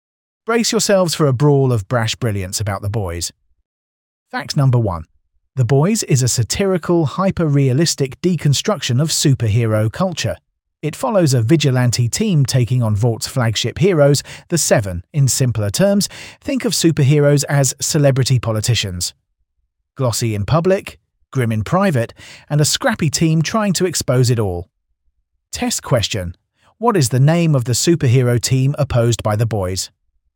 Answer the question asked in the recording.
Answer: Correct answer, The Seven.